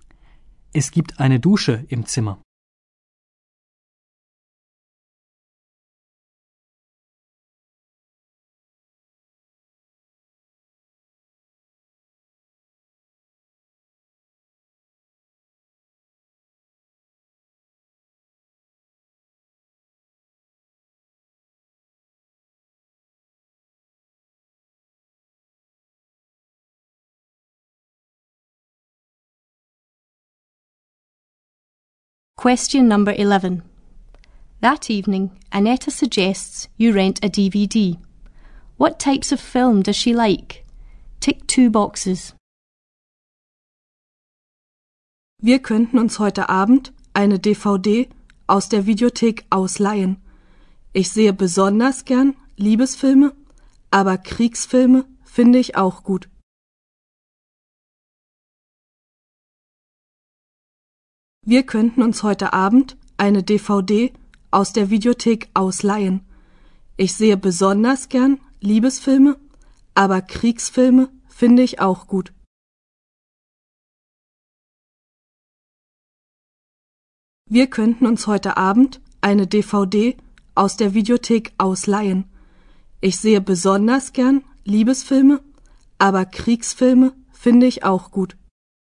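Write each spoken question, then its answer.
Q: What types of film does she like?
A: Romantic films and war films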